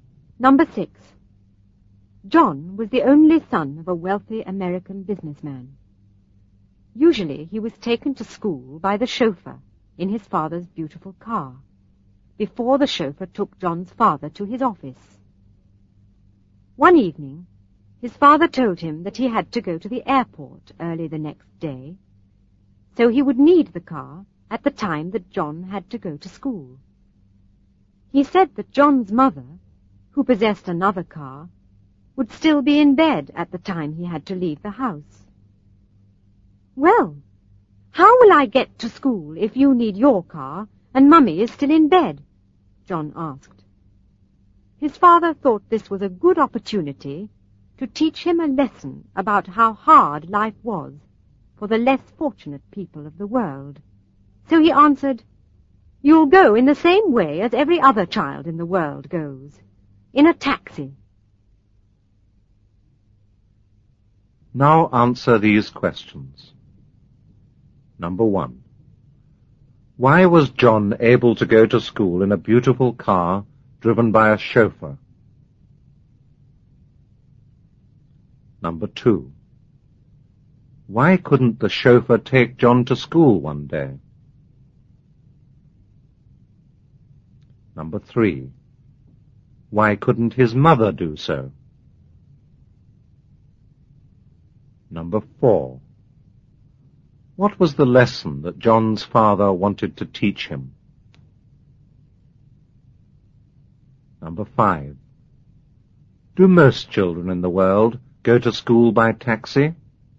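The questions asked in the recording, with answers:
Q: Why was John able to go to school in a beautiful car driven by a chauffeur?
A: Because his father was a wealthy businessman

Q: Why couldn't the chauffeur take John to school one day?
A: His father needed the car to go to the airport early

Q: Why couldn't his mother do so?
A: She would still be in bed

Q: What was the lesson that John's father wanted to teach him?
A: How hard life was for less fortunate people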